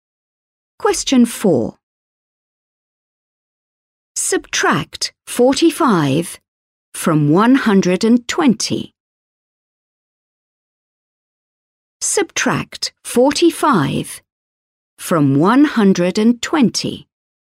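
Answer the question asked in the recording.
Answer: 75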